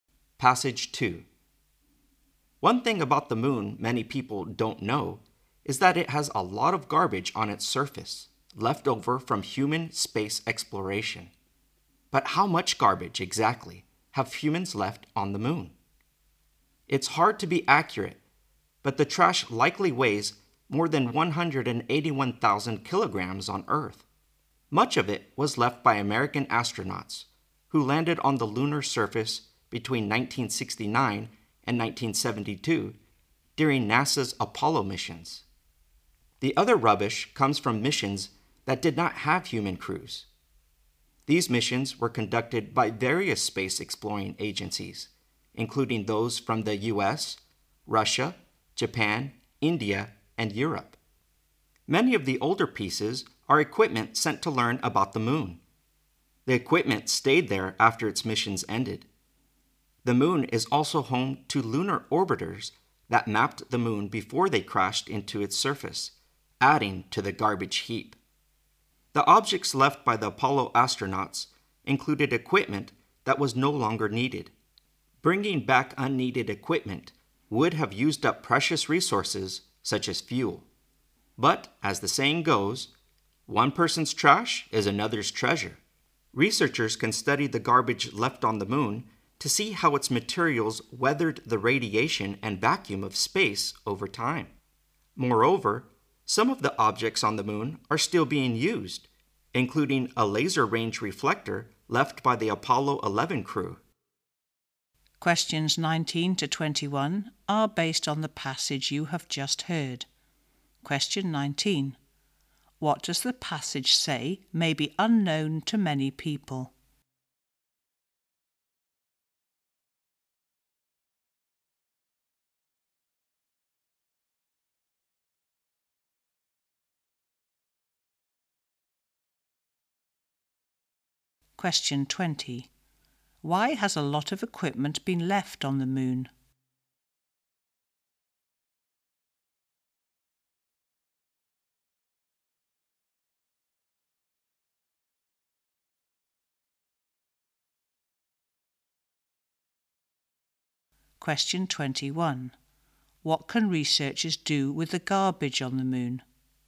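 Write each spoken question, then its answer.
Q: What does the passage say may be unknown to many people?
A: There is a lot of garbage on the moon's surface.

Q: Why has a lot of equipment been left on the moon?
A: Bringing back unneeded equipment would have used up precious resources such as fuel.

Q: What can researchers do with the garbage on the moon?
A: Study how its materials withstood radiation and the vacuum of space over time.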